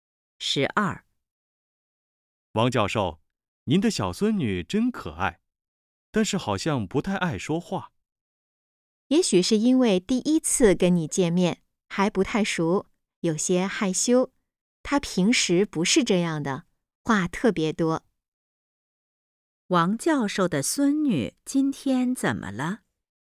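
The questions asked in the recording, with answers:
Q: 王教授的孙女今天怎么了?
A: 有些害羞,不太爱说话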